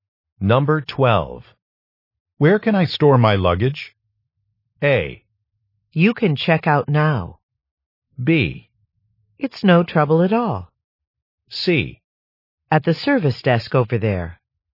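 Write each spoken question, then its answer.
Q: Where can I store my luggage?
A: C: At the service desk over there.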